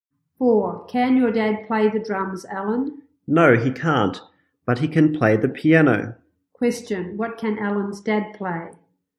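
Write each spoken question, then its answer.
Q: What can Alan's dad play?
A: The piano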